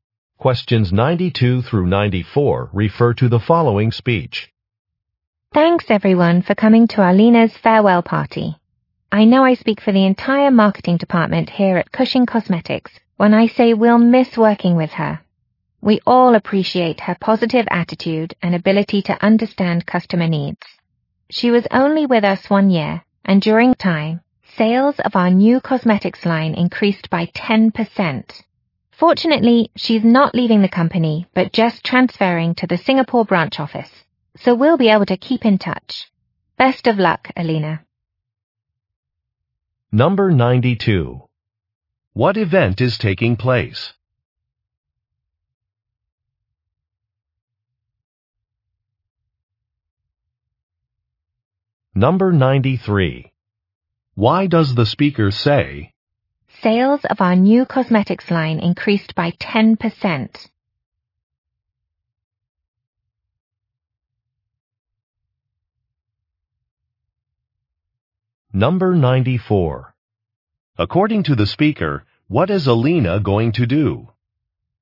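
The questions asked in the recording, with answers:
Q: What event is taking place?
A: A farewell party

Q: According to the speaker, what is Alina going to do?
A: Transfer to the Singapore branch office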